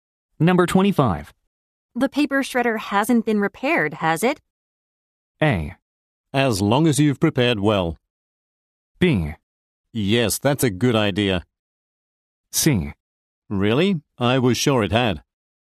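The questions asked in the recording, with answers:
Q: The paper shredder hasn't been repaired, has it?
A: C: Really? I was sure it had.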